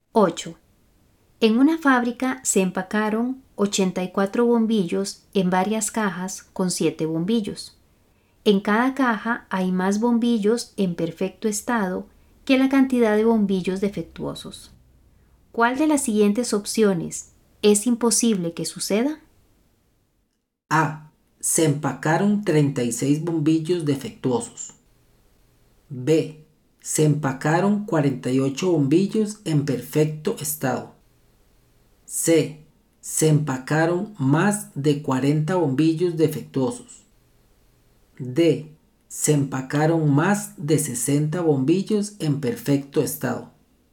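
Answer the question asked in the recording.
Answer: C: Se empacaron más de 40 bombillos defectuosos.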